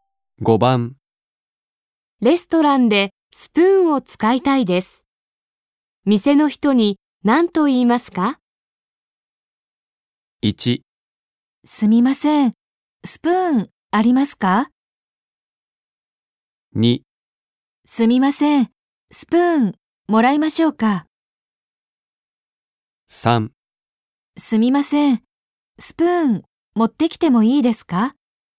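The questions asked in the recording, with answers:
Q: レストランでスプーンを使いたいです。店の人に何と言いますか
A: 1: すみません、スプーンありますか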